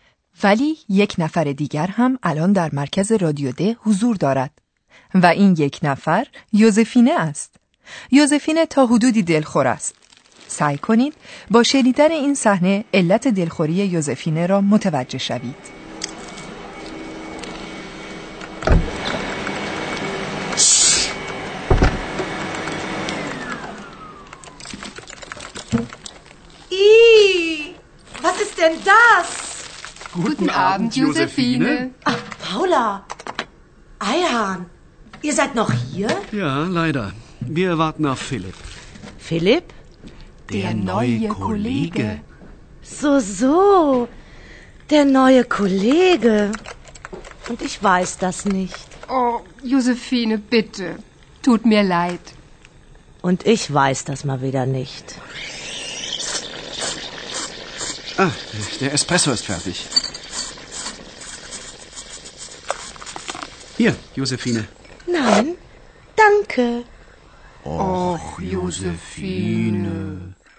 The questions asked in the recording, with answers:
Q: سعی کنید با شنیدن این صحنه علت دلخوری یوزفینه را متوجه شوید.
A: و از این بابت که کسی چیزی در ارتباط با آمدن این همکار جدید به او نگفته است، به حق دلخور شده است.